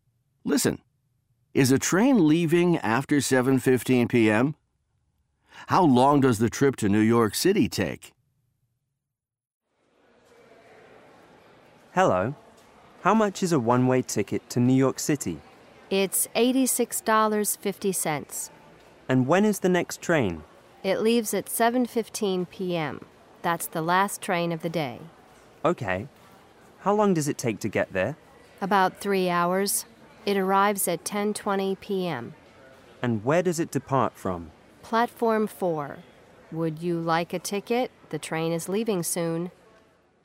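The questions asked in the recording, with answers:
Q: Is a train leaving after 7:15 p.m.?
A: No, 7:15 p.m. is the last train of the day.

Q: How long does the trip to New York City take?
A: About 3 hours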